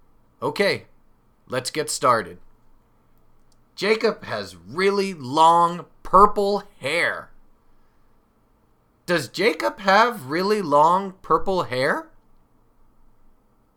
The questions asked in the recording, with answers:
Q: Does Jacob have really long purple hair?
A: Yes, he does. Jacob has really long purple hair.